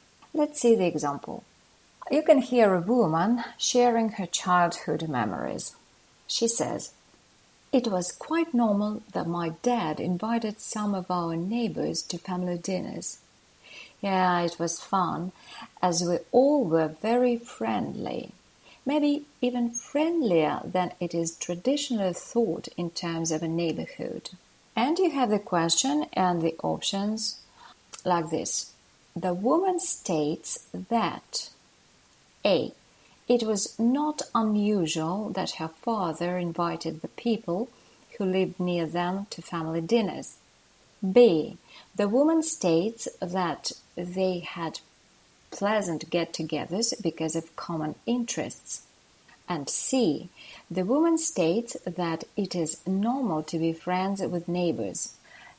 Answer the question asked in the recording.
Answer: So, A is the only correct option.